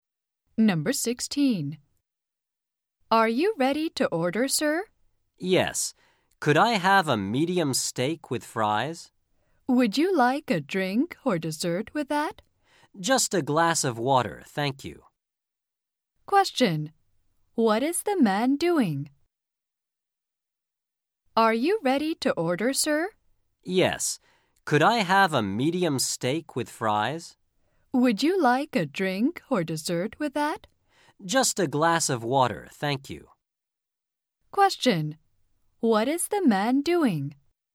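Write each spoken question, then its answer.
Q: What is the man doing?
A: Ordering food in a restaurant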